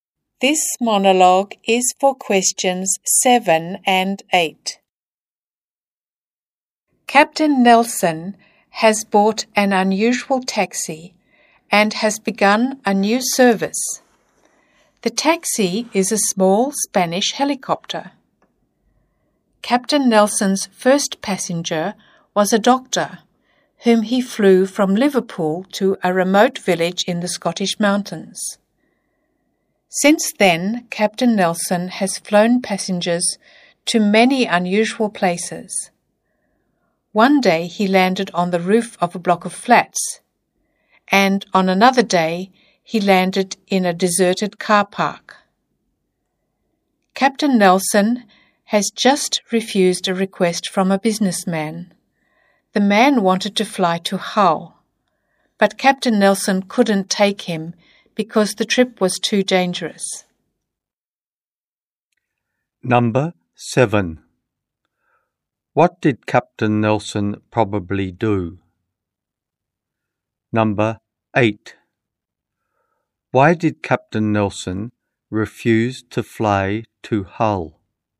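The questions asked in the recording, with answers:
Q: What did Captain Nelson probably do?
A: He ran a helicopter taxi service

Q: Why did Captain Nelson refuse to fly to Hull?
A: The trip was too dangerous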